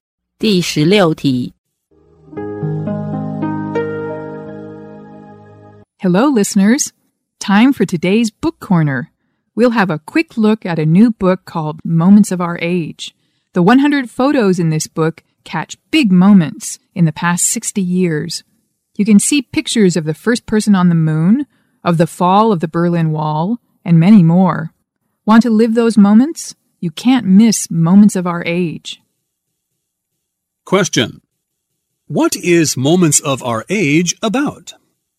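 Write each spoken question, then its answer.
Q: What is Moments of Our Age about?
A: Photos of big moments in the past 60 years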